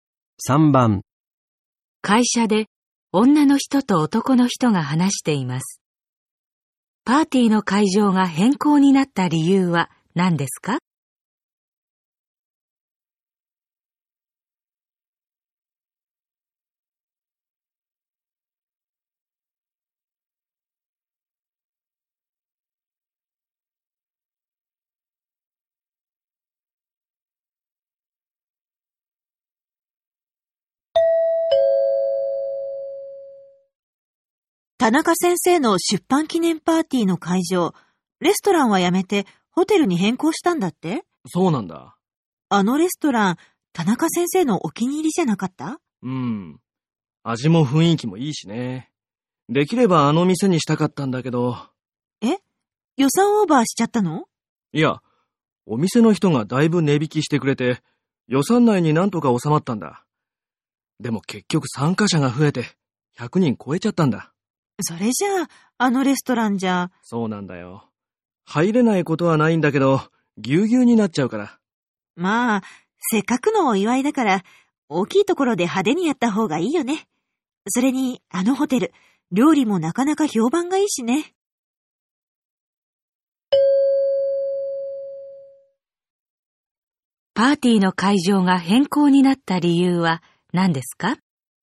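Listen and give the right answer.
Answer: 参加者が100人を超えてレストランが狭くなるから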